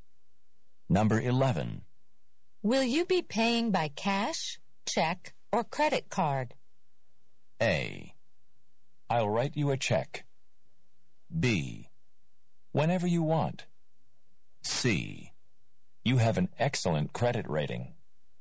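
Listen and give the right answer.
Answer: A: I'll write you a check.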